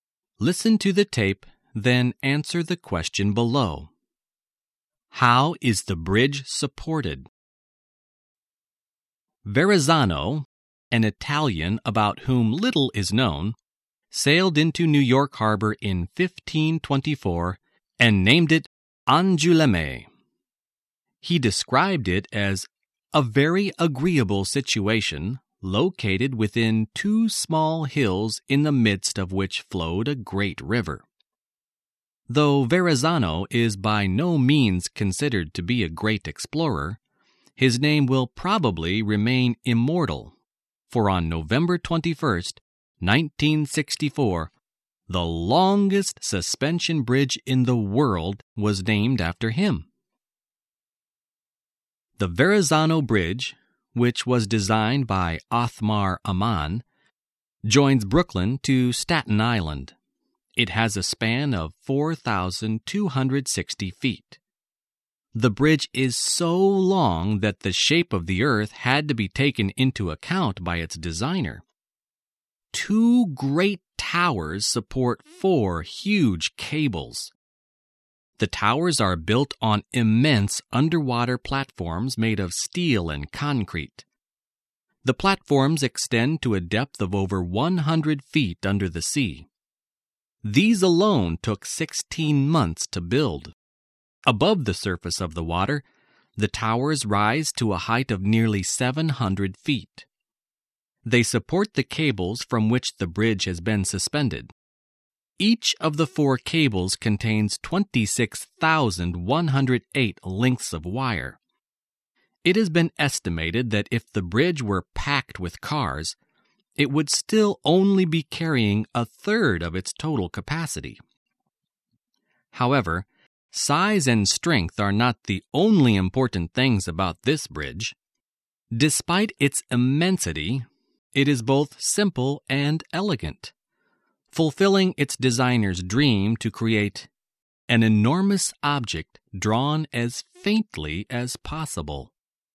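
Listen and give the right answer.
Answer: By two great towers that support four huge cables; the towers stand on huge steel and concrete platforms under the water.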